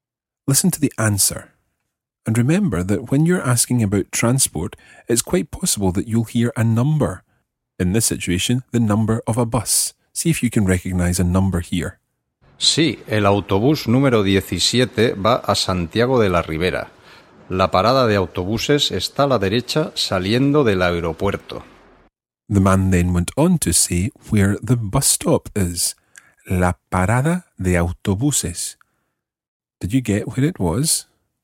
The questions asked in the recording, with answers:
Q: Did you get where it was?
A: Está a la derecha. It's on the right.